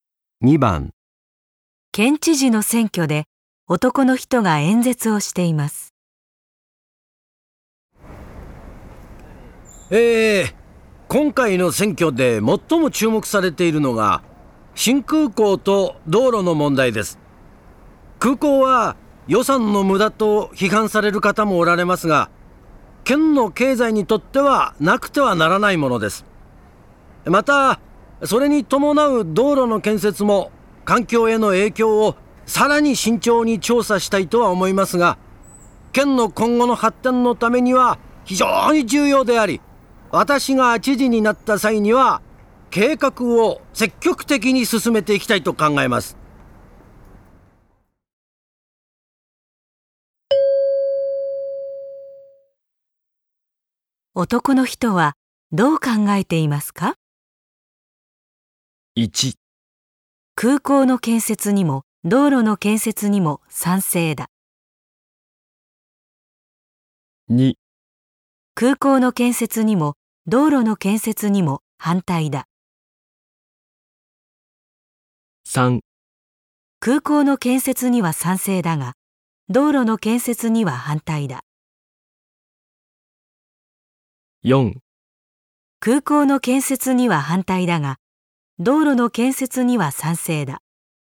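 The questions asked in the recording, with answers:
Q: 男の人はどう考えていますか?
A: 1: 空港の建設にも道路の建設にも賛成だ。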